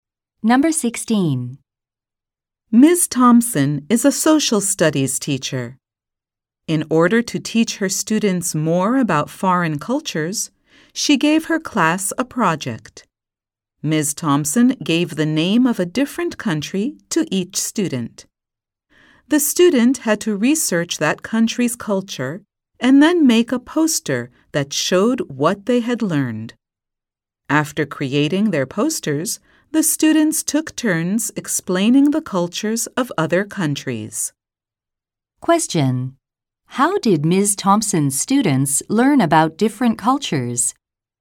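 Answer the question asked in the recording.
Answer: Each researched a country and made a poster, then explained it to the class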